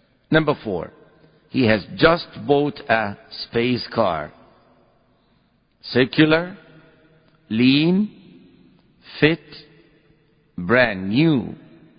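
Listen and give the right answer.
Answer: D: brand new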